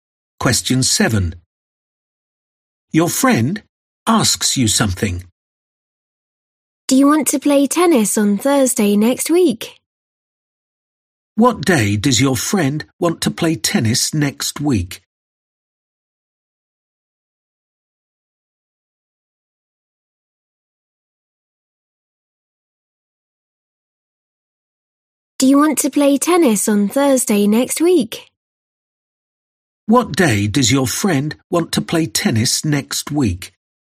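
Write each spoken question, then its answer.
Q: What day does your friend want to play tennis next week?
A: Thursday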